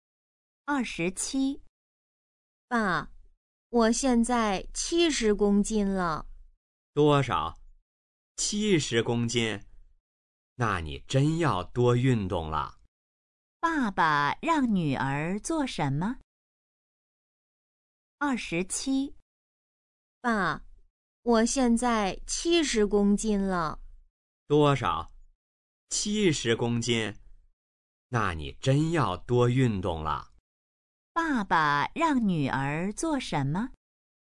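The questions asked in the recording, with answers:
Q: 爸爸让女儿做什么?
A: 多运动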